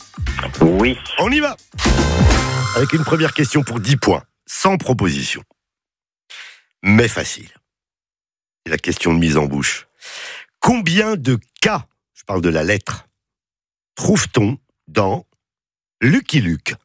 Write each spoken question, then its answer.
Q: Combien de K, je parle de la lettre, trouve-t-on dans Lucky Luke ?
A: L-U-C-K-Y, L-U-K-E-2, évidemment.